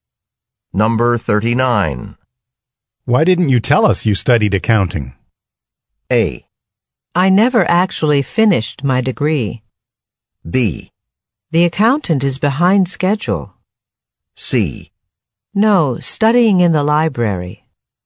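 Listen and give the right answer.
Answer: A: I never actually finished my degree.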